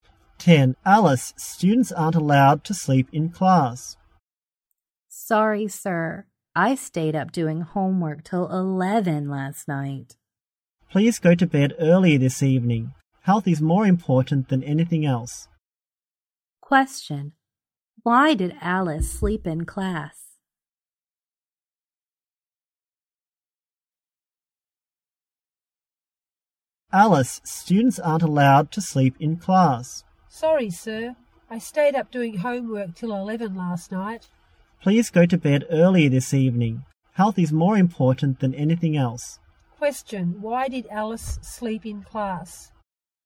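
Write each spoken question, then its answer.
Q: Question, why did Alice sleep in class?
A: She stayed up doing homework till 11 last night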